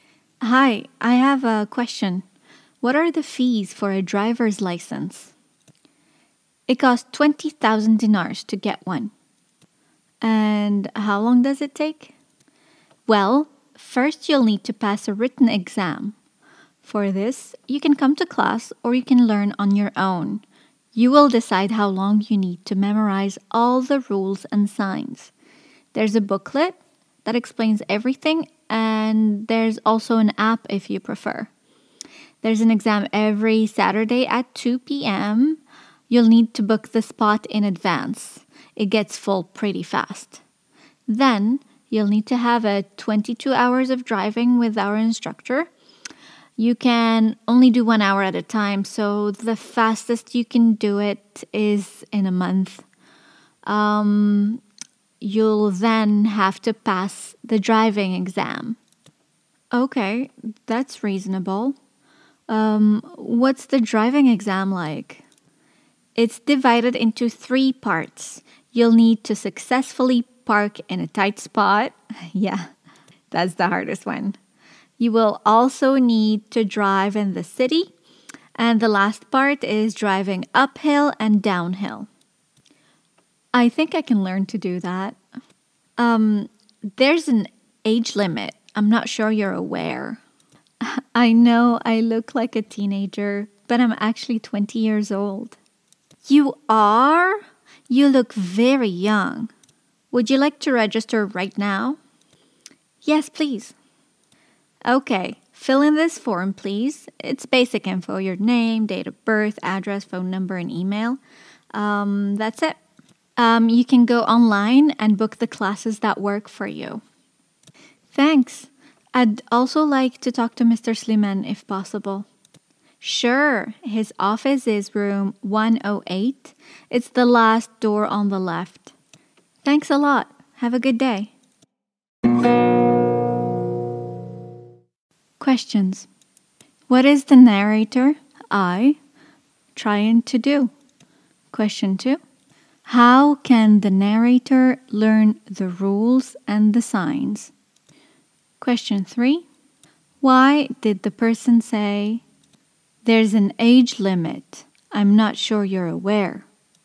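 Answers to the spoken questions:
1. Get a driver's license (register for driving lessons)
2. By coming to class or learning on their own with a booklet or an app
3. Because the narrator looks very young, like a teenager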